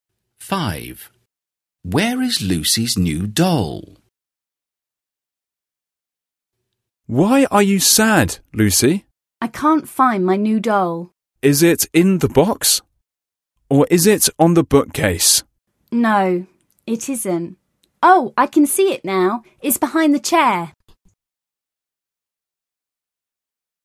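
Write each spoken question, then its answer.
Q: Where is Lucy's new doll?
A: behind the chair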